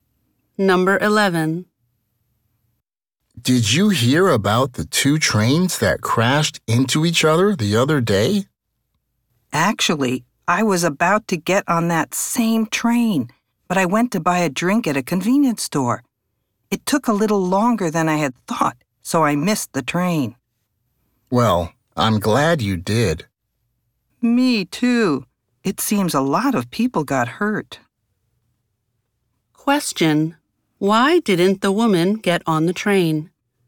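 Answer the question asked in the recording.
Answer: Buying a drink at a convenience store took longer than she expected, so she missed the train.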